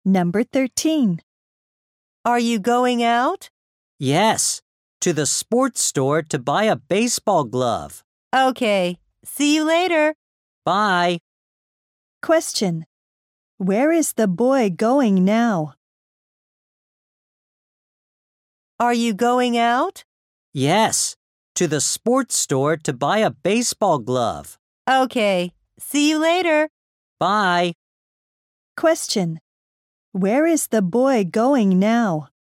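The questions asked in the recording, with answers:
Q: Where is the boy going now?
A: To the sports store.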